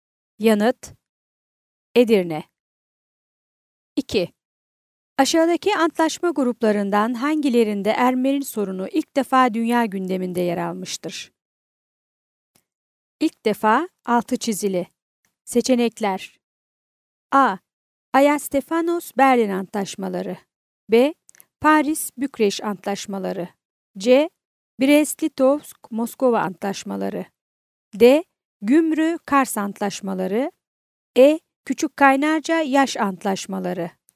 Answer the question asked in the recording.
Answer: Yanıt: Ankara.